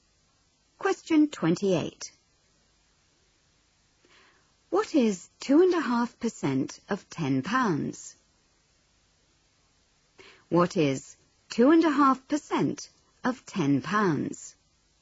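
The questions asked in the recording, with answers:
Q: What is 2.5% of £10?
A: 25p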